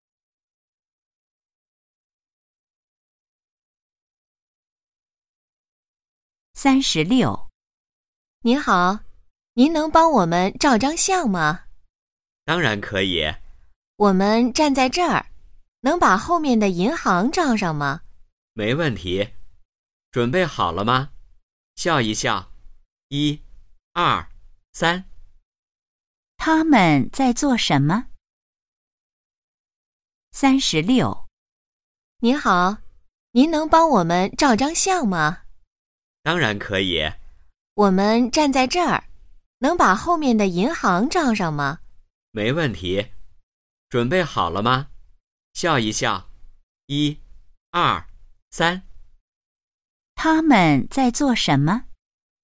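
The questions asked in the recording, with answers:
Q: 他们在做什么?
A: 照相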